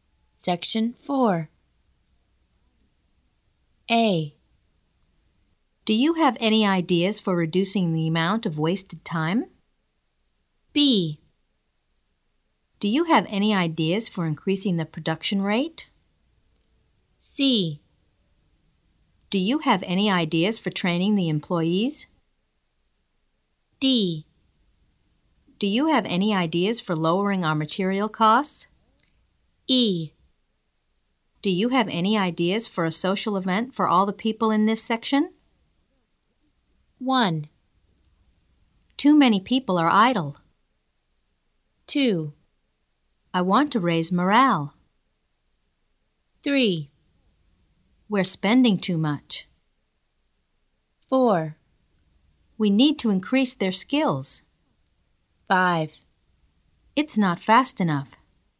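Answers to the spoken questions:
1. A: Do you have any ideas for reducing the amount of wasted time?
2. E: Do you have any ideas for a social event for all the people in this section?
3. D: Do you have any ideas for lowering our material costs?
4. C: Do you have any ideas for training the employees?
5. B: Do you have any ideas for increasing the production rate?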